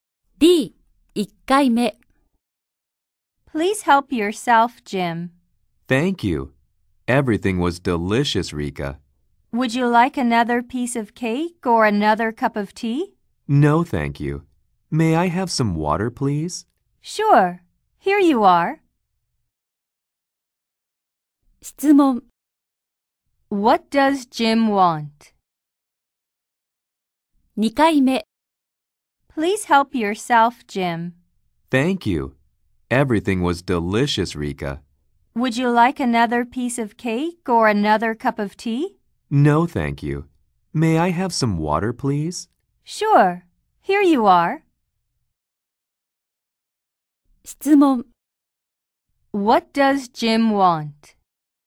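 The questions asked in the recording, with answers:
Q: What does Jim want?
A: Some water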